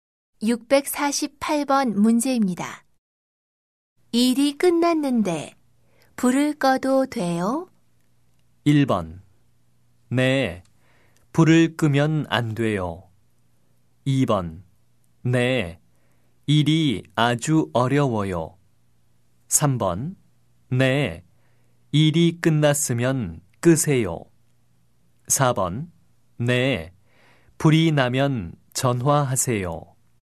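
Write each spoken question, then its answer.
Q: 일이 끝났는데 불을 꺼도 돼요?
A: 3: 네, 일이 끝났으면 끄세요.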